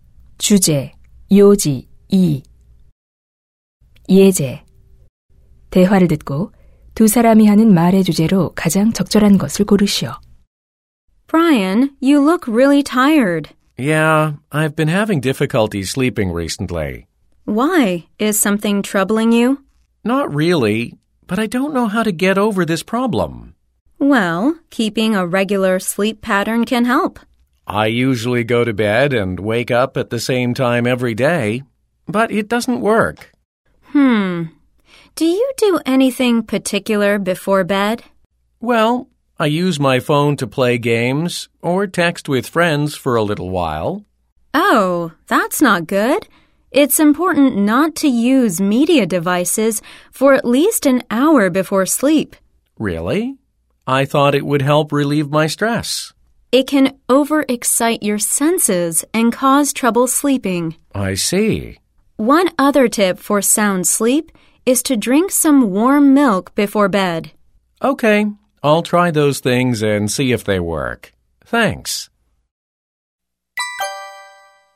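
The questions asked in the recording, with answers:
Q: 대화를 듣고 두 사람이 하는 말의 주제로 가장 적절한 것을 고르시오.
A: 숙면을 위한 방법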